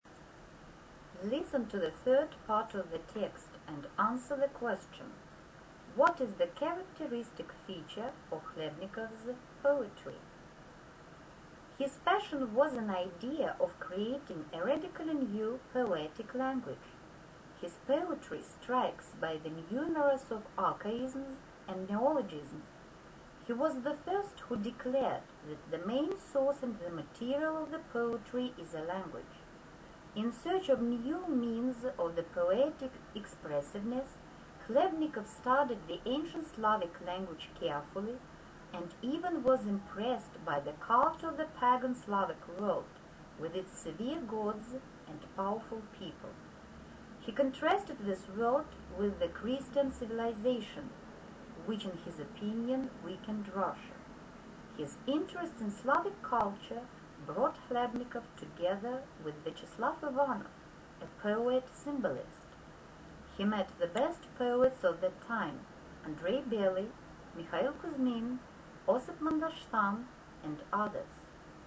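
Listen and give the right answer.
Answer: Numerous archaisms and neologisms, in a radically new poetic language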